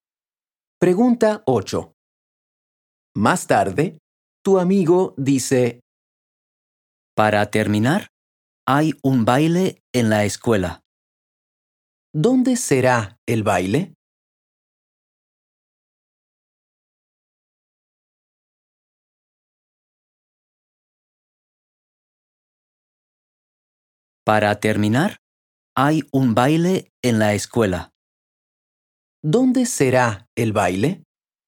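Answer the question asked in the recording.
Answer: En la escuela.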